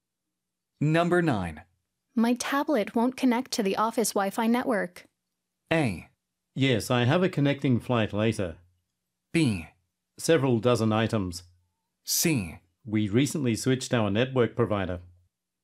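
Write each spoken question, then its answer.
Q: My tablet won't connect to the office Wi-Fi network.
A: C: We recently switched our network provider.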